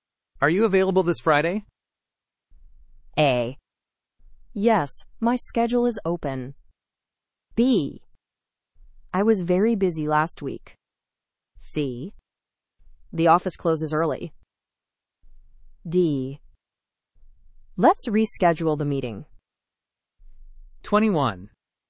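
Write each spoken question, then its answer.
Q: Are you available this Friday?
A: A: Yes, my schedule is open.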